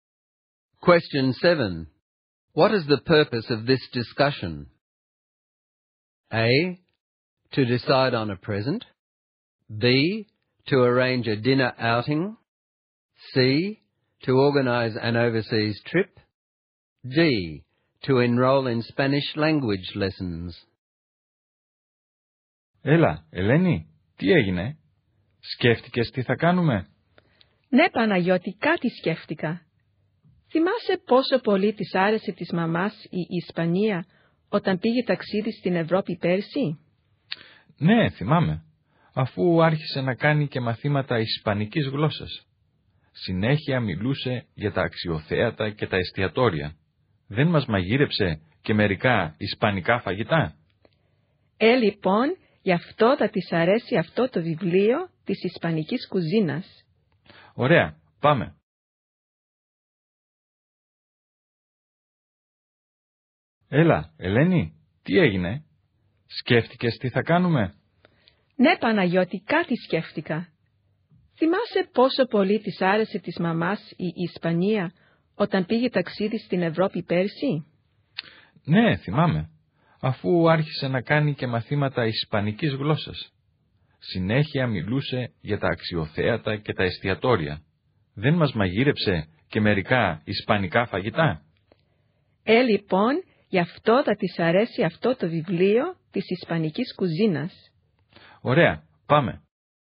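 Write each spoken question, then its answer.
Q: What is the purpose of this discussion?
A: A: To decide on a present.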